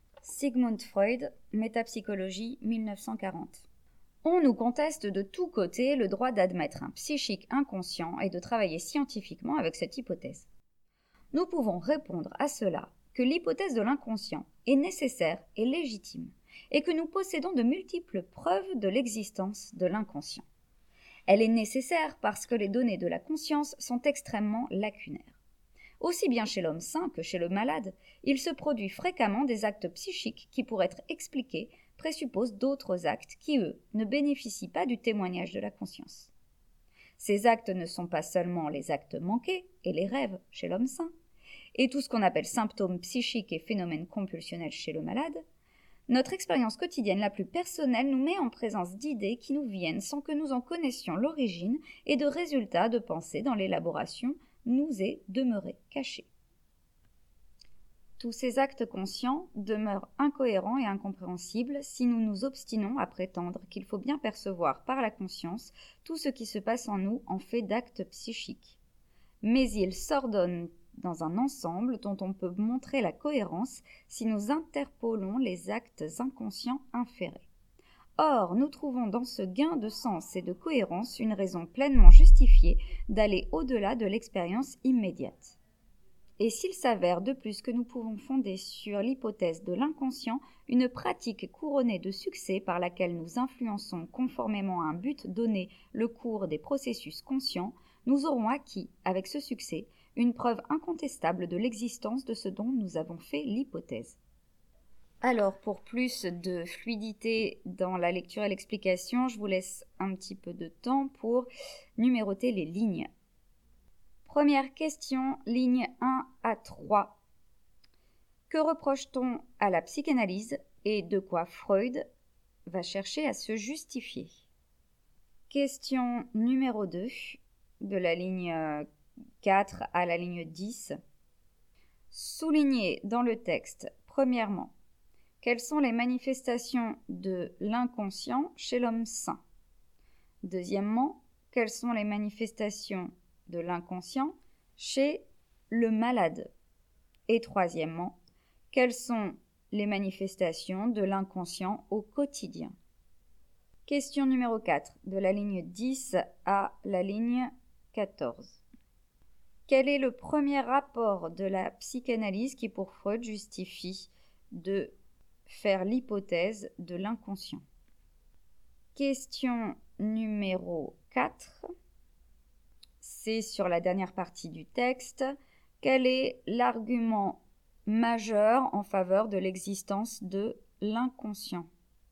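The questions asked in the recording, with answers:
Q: Que reproche-t-on à la psychanalyse et de quoi Freud va chercher à se justifier?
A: On lui conteste le droit d'admettre un psychique inconscient et de travailler scientifiquement avec cette hypothèse

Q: quelles sont les manifestations de l'inconscient chez l'homme sain?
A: Les actes manqués et les rêves

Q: quelles sont les manifestations de l'inconscient chez le malade?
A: Les symptômes psychiques et les phénomènes compulsionnels

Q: quelles sont les manifestations de l'inconscient au quotidien?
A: Des idées qui nous viennent sans qu'on en connaisse l'origine et des résultats de pensée dont l'élaboration reste cachée

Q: Quel est l'argument majeur en faveur de l'existence de l'inconscient?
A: Le succès d'une pratique fondée sur l'hypothèse de l'inconscient, qui influence les processus conscients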